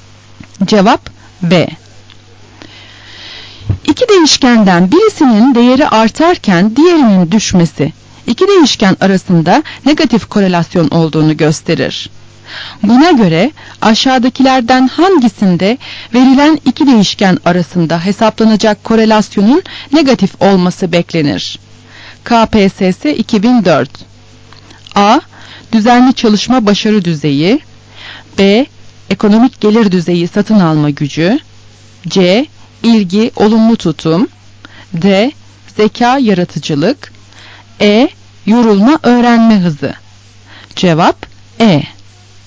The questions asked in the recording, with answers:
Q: Buna göre aşağıdakilerden hangisinde verilen iki değişken arasında hesaplanacak korelasyonun negatif olması beklenir?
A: Cevap E.